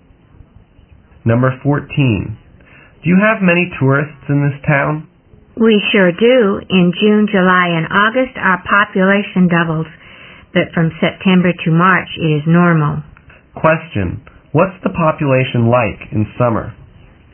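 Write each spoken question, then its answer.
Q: What's the population like in summer?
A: It doubles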